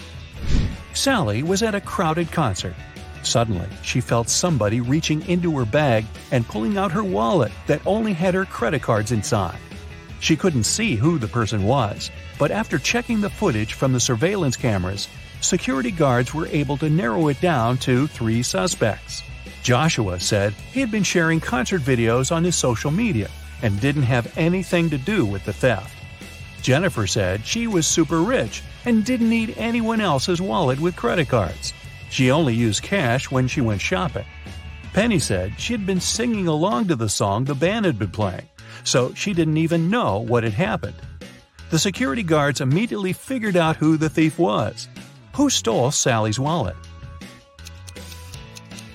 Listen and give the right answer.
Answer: Nobody told Jennifer that the wallet contained only credit cards, but somehow she still knew it.